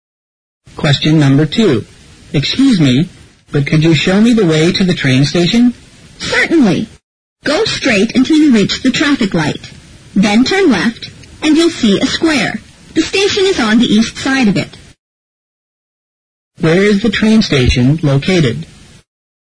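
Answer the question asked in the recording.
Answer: On the east side of the square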